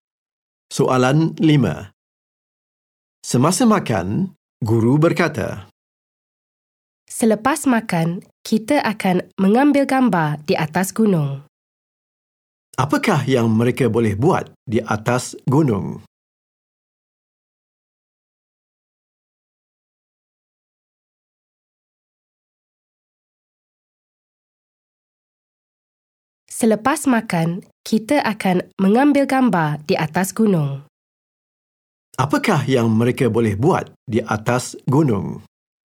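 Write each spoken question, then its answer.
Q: Apakah yang mereka boleh buat di atas gunung?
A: Mengambil gambar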